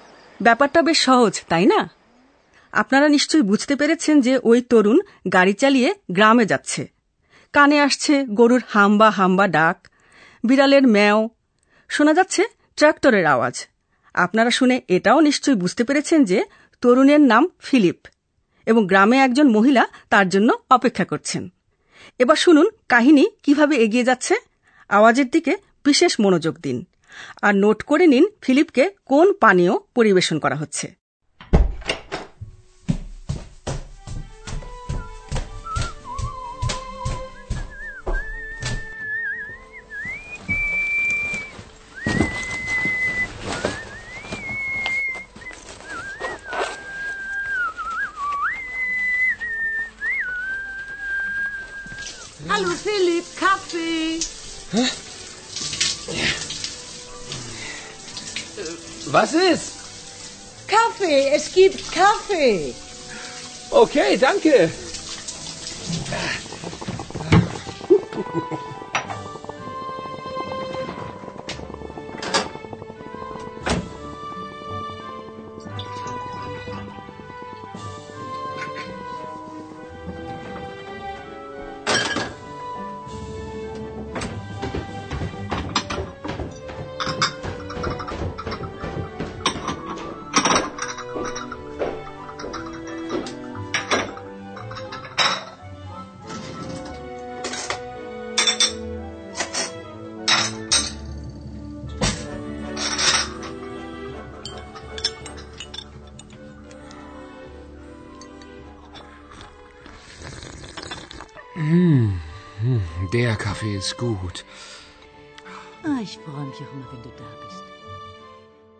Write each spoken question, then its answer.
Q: নোট করে নিন ফিলিপকে কোন পানীয় পরিবেশন করা হচ্ছে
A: তাকে কফি খেতে দেন